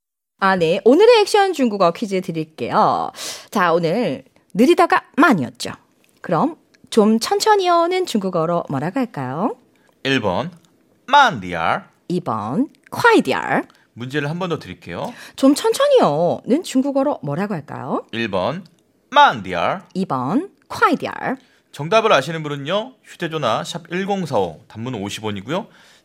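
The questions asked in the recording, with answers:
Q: 좀천천히어는중국어로뭐라고할까요?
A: 1: 만디얼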